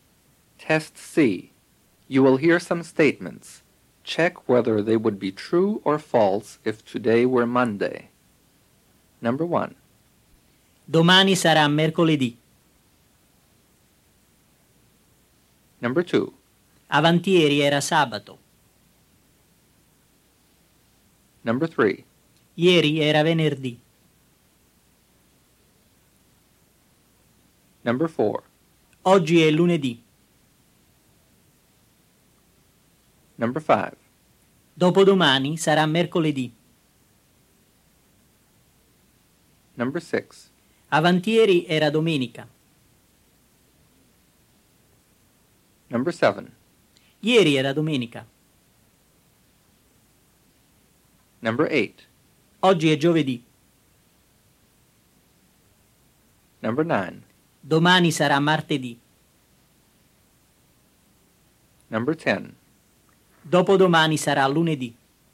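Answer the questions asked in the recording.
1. Falso
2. Vero
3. Falso
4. Vero
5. Vero
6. Falso
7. Vero
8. Falso
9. Vero
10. Falso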